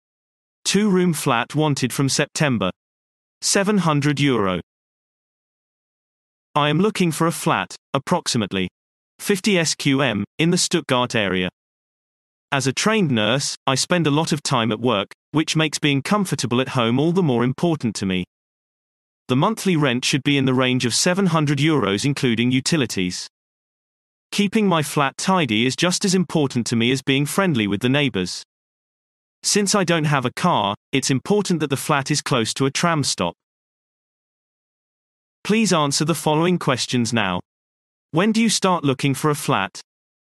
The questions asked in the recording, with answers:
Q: When do you start looking for a flat?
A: Response. The flat is wanted from September.